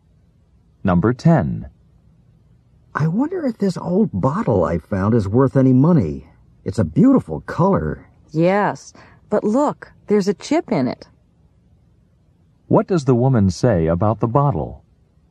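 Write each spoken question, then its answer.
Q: What does the woman say about the bottle?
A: It has a chip in it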